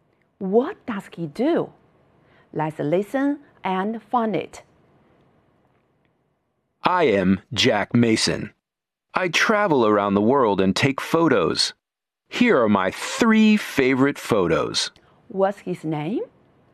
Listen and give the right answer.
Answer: Yes, he is Jack Mason.